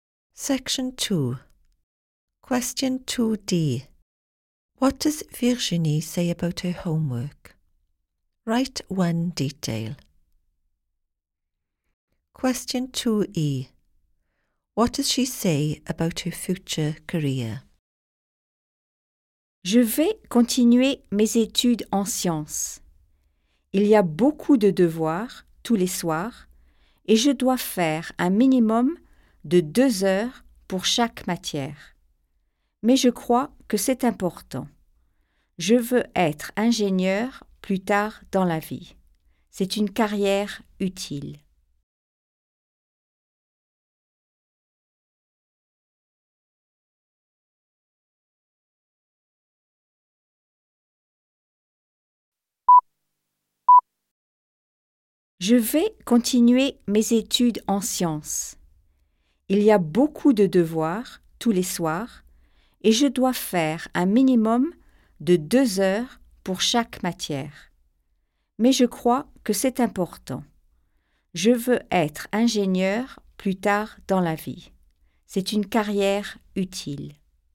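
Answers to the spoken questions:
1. Lots every evening, minimum 2 hours per subject
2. She wants to be an engineer; it is a useful career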